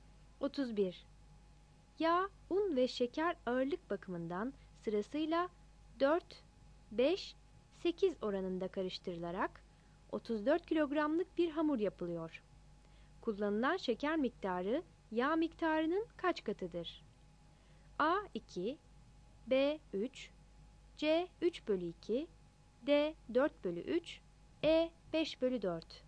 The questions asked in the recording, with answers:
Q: Kullanılan şeker miktarı yağ miktarının kaç katıdır?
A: 31 A